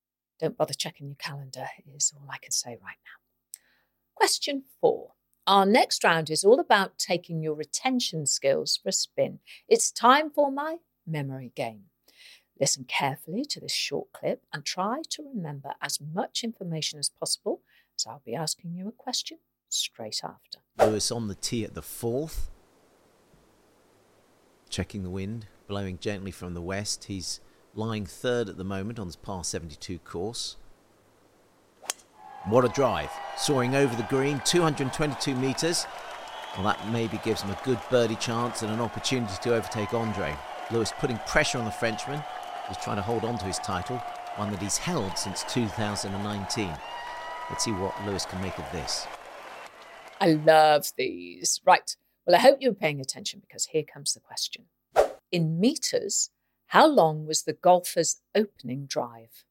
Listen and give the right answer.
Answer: And the answer, if you recalled it correctly, was 222 metres.